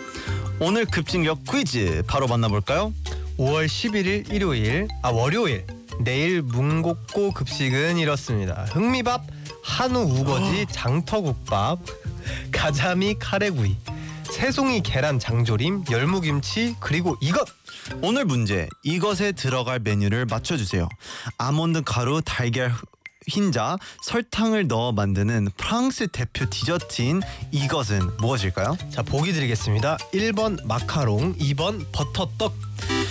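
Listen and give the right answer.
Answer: 1번: 마카롱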